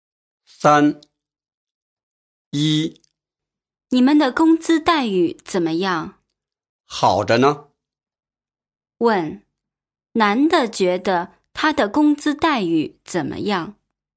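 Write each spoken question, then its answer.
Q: 问,男的觉得他的工资待遇怎么样?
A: 很好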